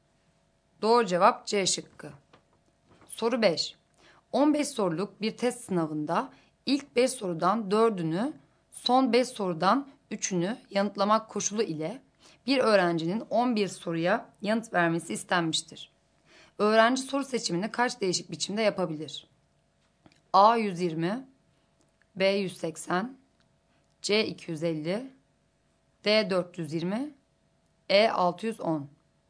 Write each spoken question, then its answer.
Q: Öğrenci soru seçimini kaç değişik biçimde yapabilir?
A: Doğru cevap C şıkkı.